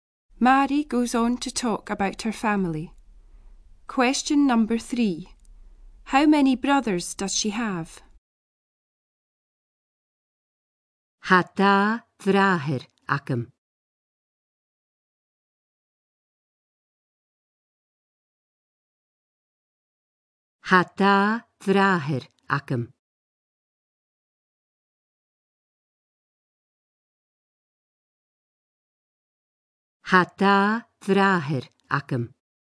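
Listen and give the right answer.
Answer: Two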